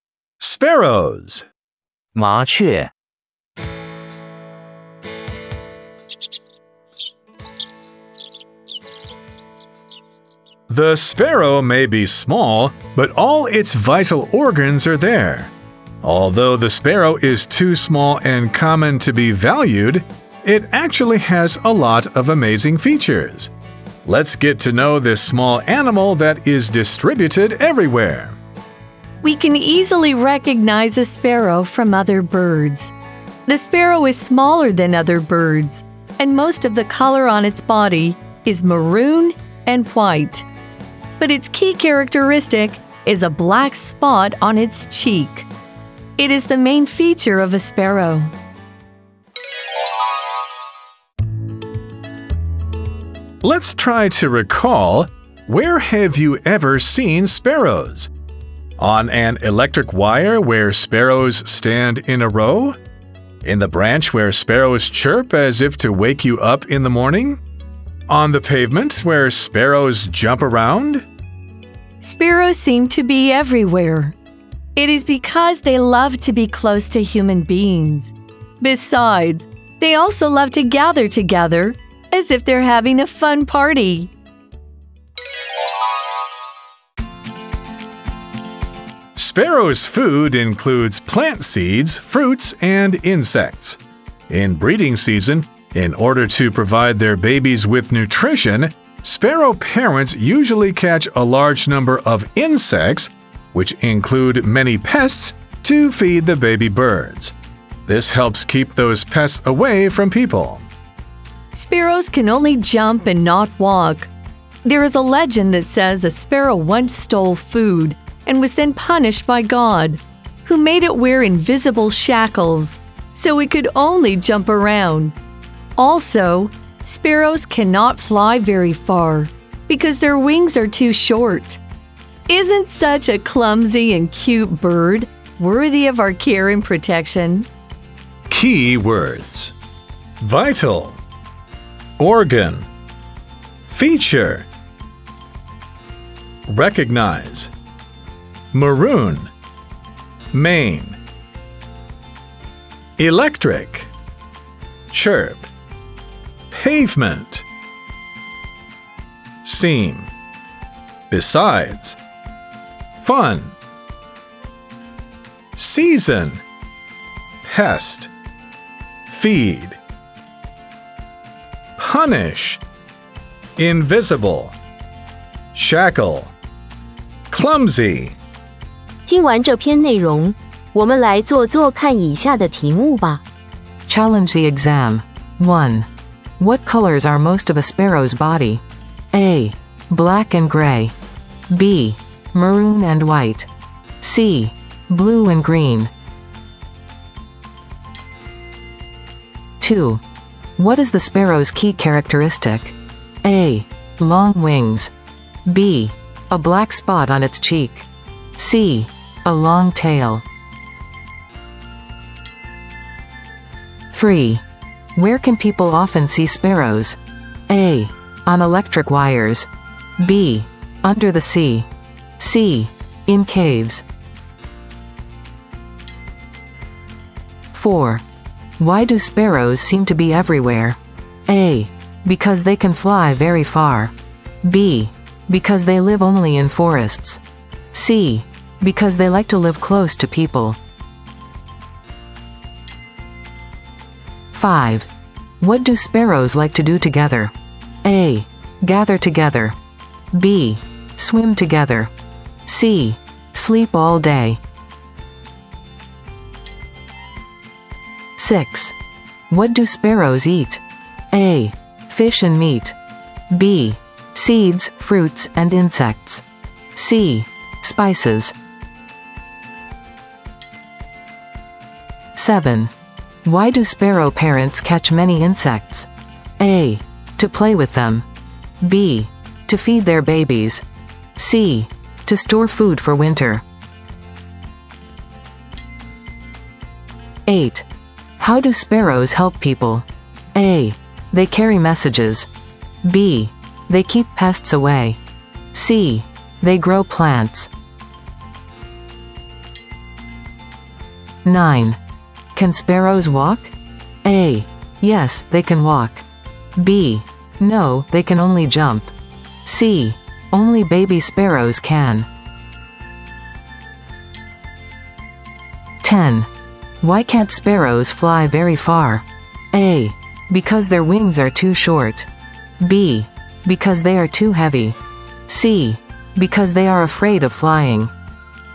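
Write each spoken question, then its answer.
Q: What colors are most of a sparrow's body?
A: B: Maroon and white.

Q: What is the sparrow's key characteristic?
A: B: A black spot on its cheek.

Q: Where can people often see sparrows?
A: A: On electric wires.

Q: Why do sparrows seem to be everywhere?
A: C: Because they like to live close to people.

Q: What do sparrows like to do together?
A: A: Gather together.

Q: What do sparrows eat?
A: B: Seeds, fruits, and insects.

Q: Why do sparrow parents catch many insects?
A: B: To feed their babies.

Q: How do sparrows help people?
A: B: They keep pests away.

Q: Can sparrows walk?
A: B: No, they can only jump.

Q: Why can't sparrows fly very far?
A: A: Because their wings are too short.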